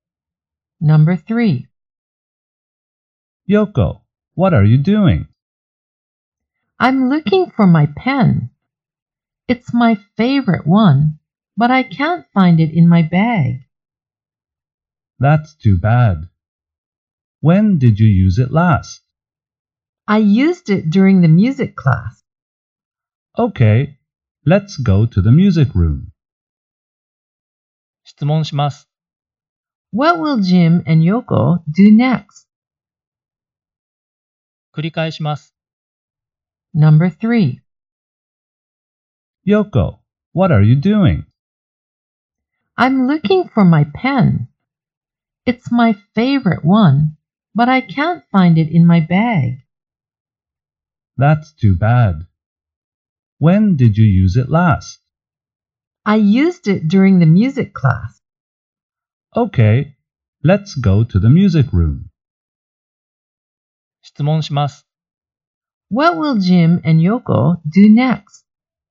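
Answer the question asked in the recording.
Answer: They will go to the music room to look for Yoko's pen.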